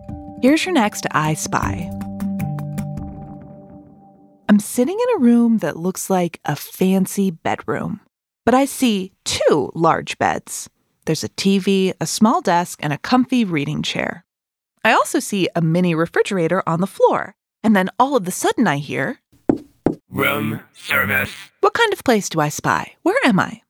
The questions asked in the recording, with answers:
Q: What kind of place do I spy?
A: hotel! a hotel.